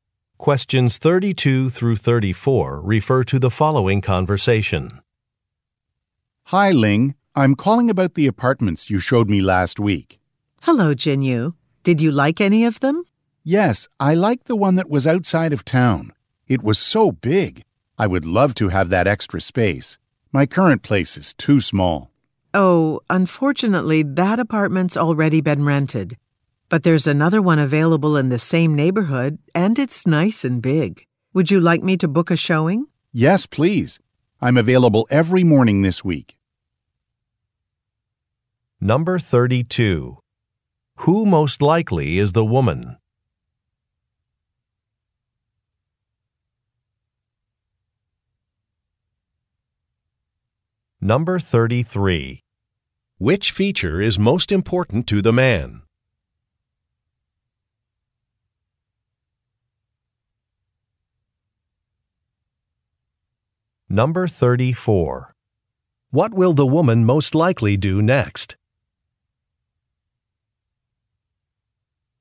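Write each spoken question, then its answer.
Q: Who most likely is the woman?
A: A real estate agent

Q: Which feature is most important to the man?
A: The size (extra space)

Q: What will the woman most likely do next?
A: Book a showing of another apartment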